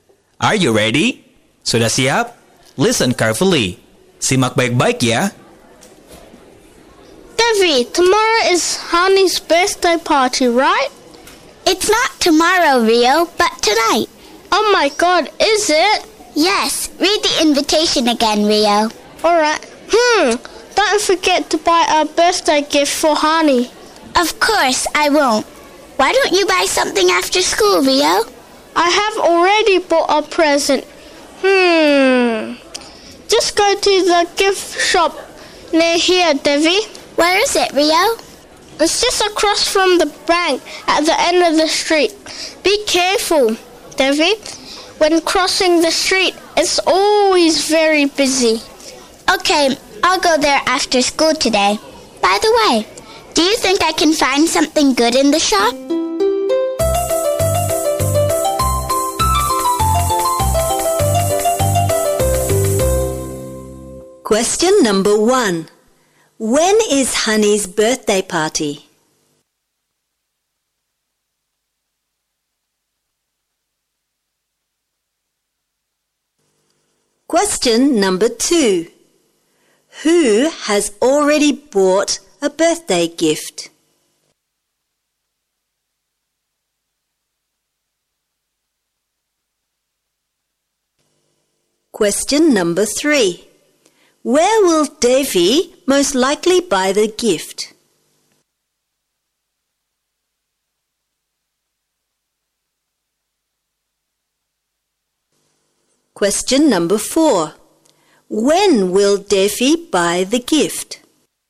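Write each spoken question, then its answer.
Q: When is Honey's birthday party?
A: Tonight

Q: Who has already bought a birthday gift?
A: Rio

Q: Where will Davy most likely buy the gift?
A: At the gift shop across from the bank at the end of the street

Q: When will Davy buy the gift?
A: After school today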